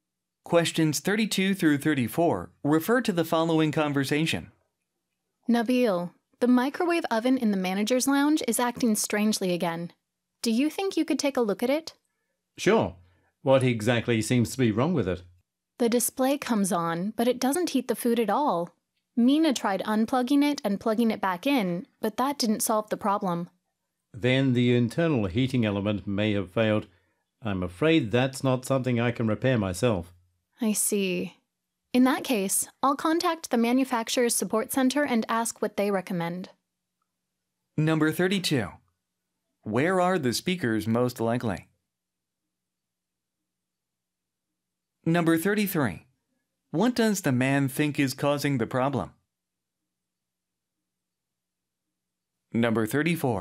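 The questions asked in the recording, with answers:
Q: What does the man think is causing the problem?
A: The internal heating element may have failed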